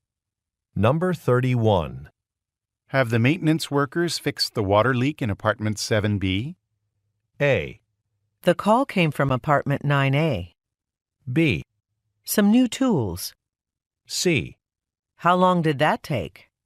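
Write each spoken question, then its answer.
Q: Have the maintenance workers fixed the water leak in apartment 7B?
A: A: The call came from apartment 9A.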